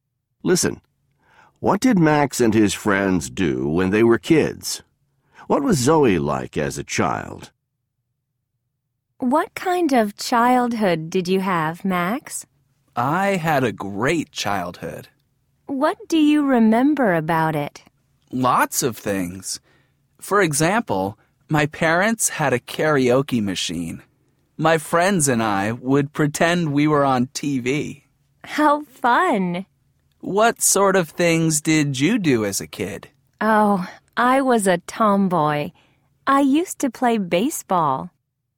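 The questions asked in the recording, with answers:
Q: What did Max and his friends do when they were kids?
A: They pretended they were on TV, using his parents' karaoke machine.

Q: What was Zoe like as a child?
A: She was a tomboy who played baseball.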